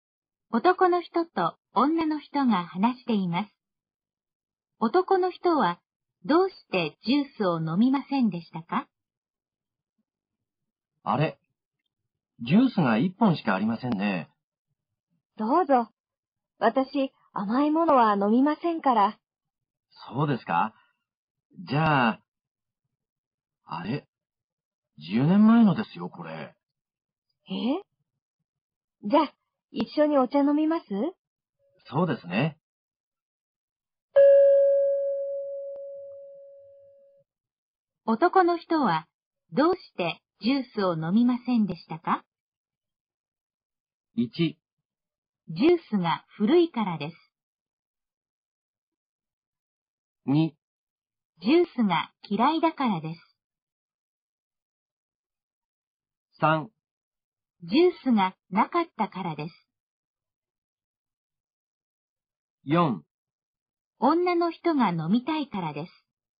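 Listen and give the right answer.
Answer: 1: ジュースが古いからです。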